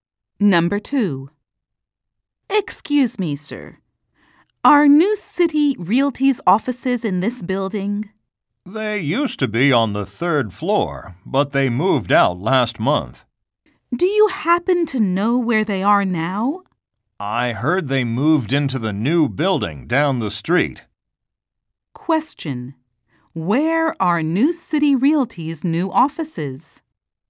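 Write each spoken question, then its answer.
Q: Where are New City Realty's new offices?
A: In the new building down the street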